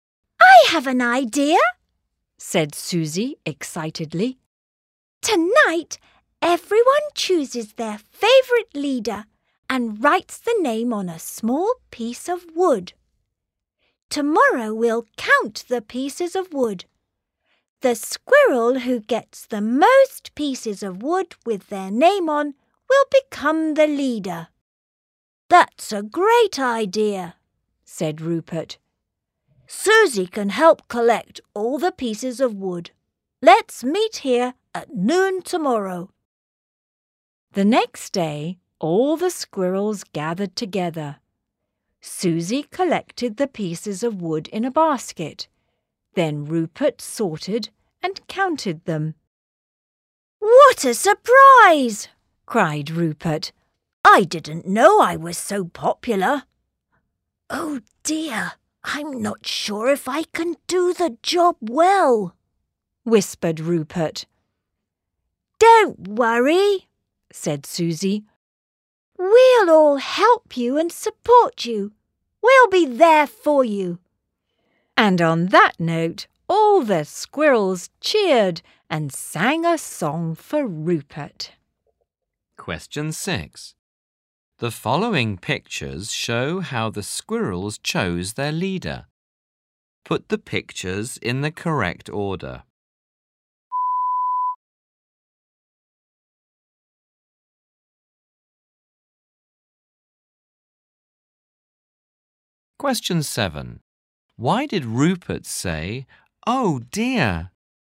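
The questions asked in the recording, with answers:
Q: Why did Rupert say, "Oh dear"?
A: He wasn't sure he could do the leader's job well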